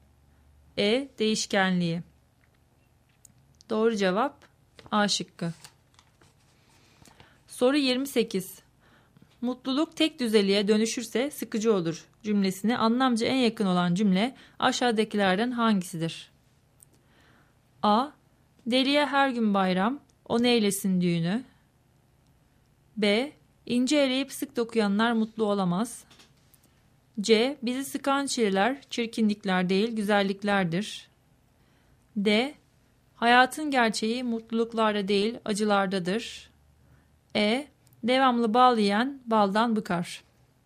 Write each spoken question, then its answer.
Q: Mutluluk tek düzeliğe dönüşürse sıkıcı olur cümlesine anlamca en yakın olan cümle aşağıdakilerden hangisidir?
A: Doğru cevap E şıkkı.